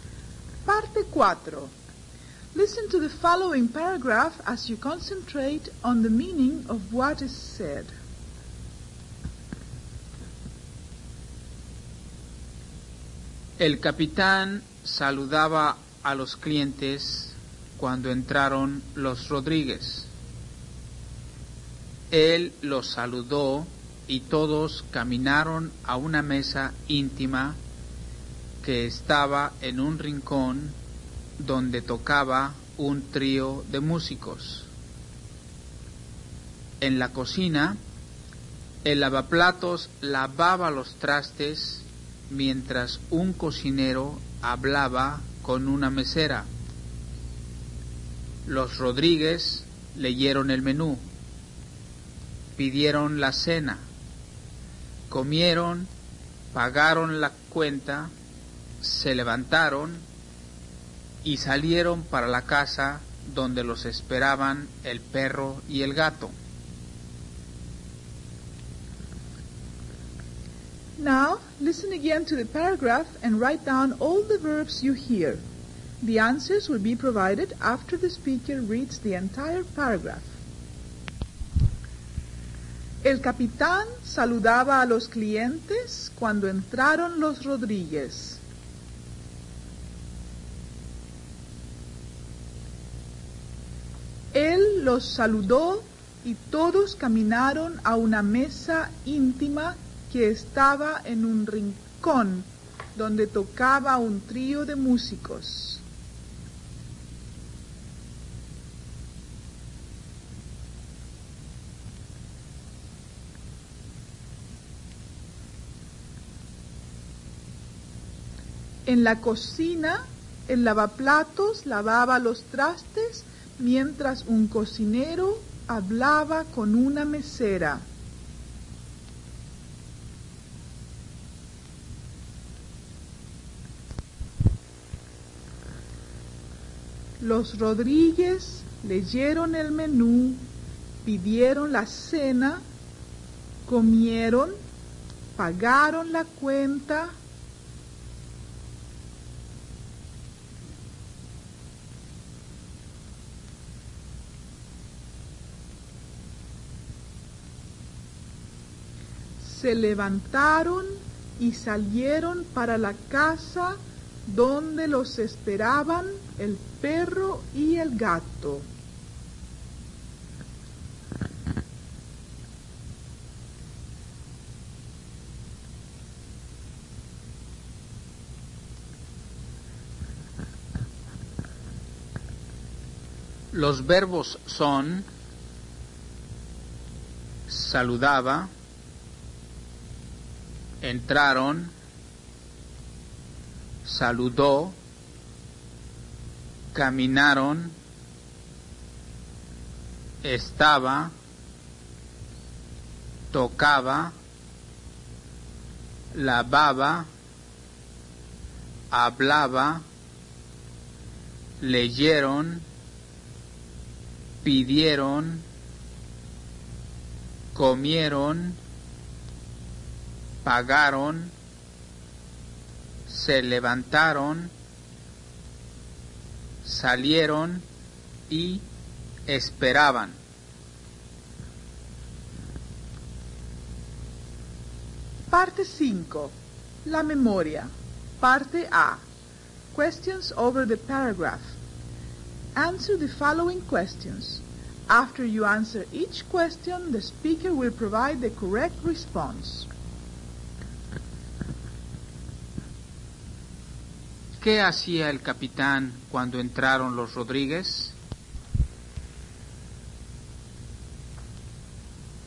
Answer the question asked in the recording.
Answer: El capitán saludaba a los clientes.